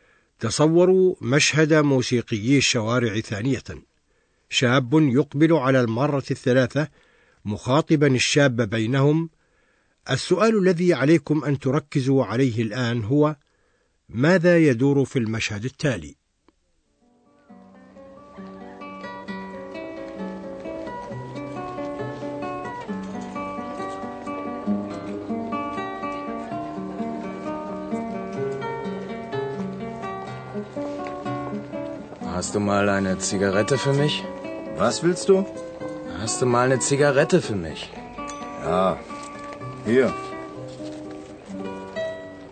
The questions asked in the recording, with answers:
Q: ماذا يدور في المشهد التالي؟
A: هذا المشهد يري أن شابا يريد سيجارة